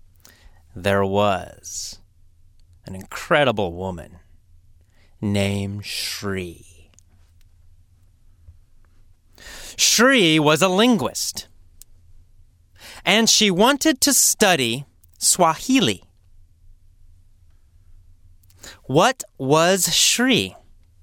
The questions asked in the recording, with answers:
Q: What was Shri?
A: Well, she was a linguist.